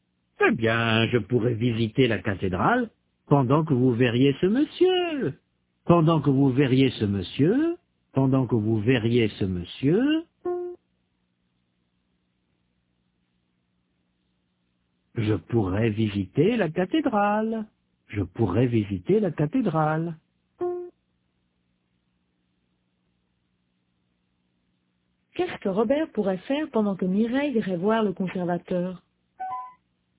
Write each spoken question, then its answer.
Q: Qu'est-ce que Robert pourrait faire pendant que Mireille irait voir le conservateur?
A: Il pourrait visiter la cathédrale.